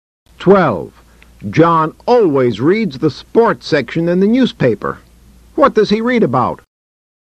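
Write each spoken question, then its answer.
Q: What does he read about?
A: Sports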